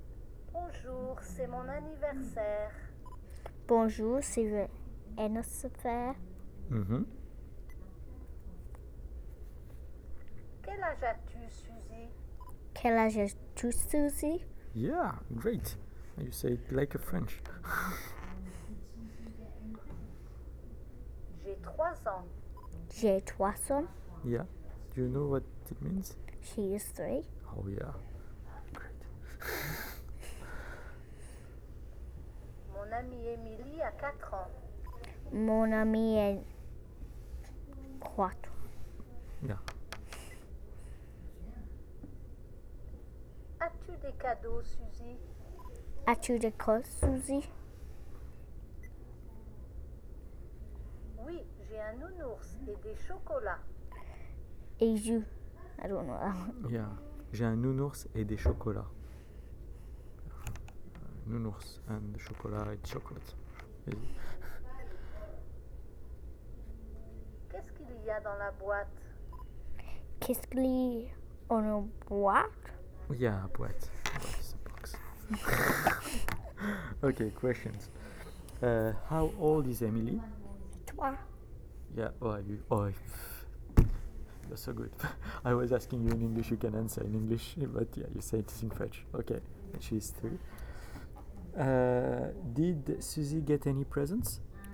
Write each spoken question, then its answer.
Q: Did Suzy get any presents?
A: Yes.